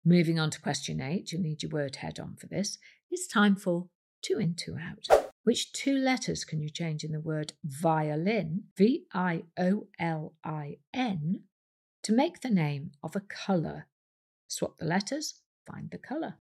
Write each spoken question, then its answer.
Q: Which two letters can you change in the word violin, V-I-O-L-I-N, to make the name of a colour?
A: If you change the I to an E and the N to a T, you get the colour violet, V-I-O-L-E-T.